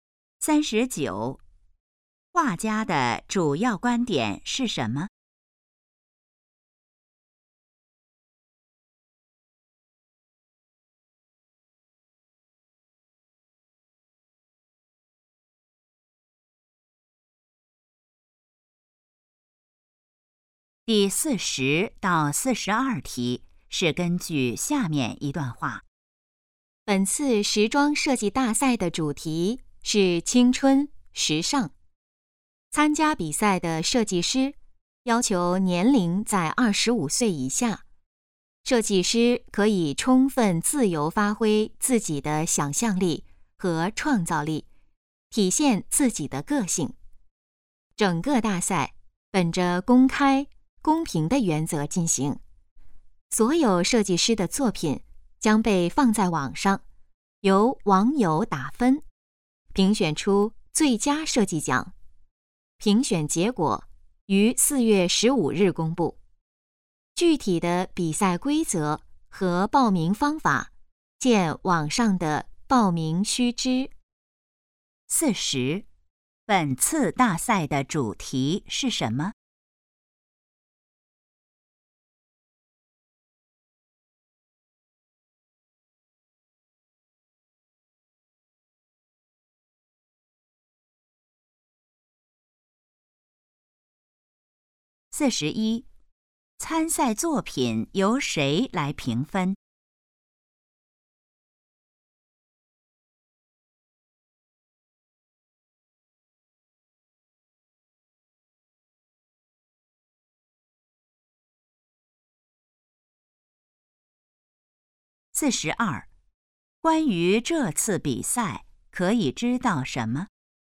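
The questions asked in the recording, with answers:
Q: 本次大赛的主题是什么?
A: 青春时尚

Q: 参赛作品由谁来评分?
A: 网友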